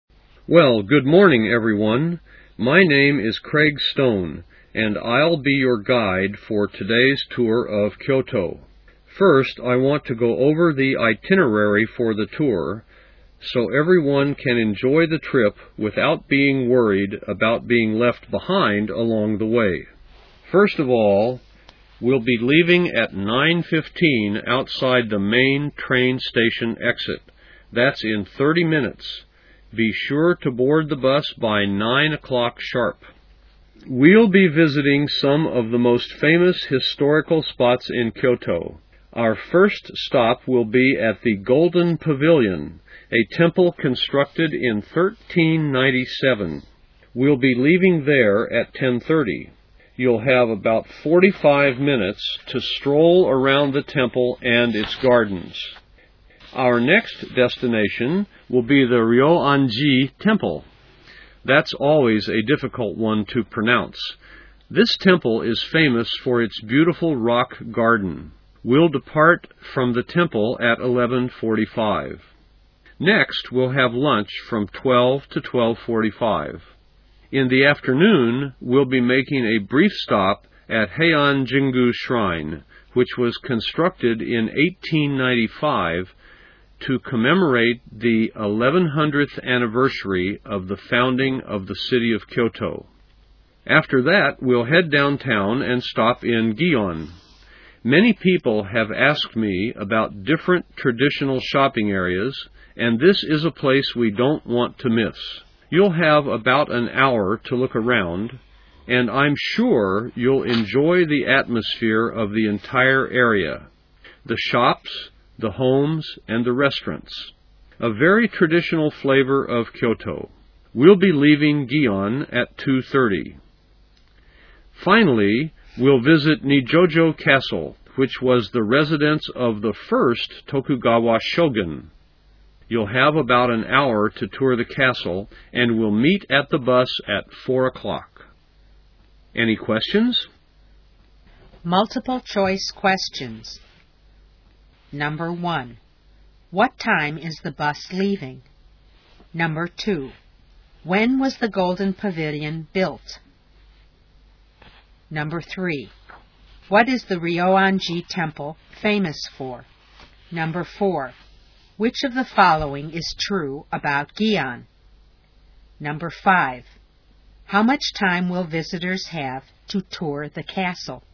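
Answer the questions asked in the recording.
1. 9:15
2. In 1397
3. Its beautiful rock garden
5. About an hour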